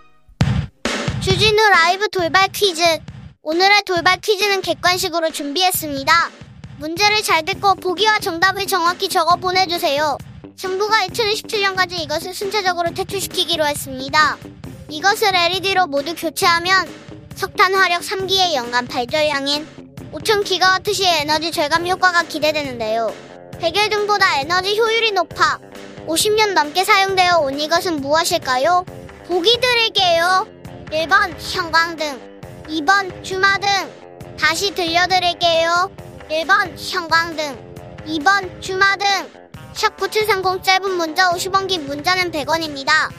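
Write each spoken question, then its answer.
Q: 백열 등보다 에너지 효율이 높아 50년 넘게 사용되어 온 이것은 무엇일까요?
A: 1번: 형광등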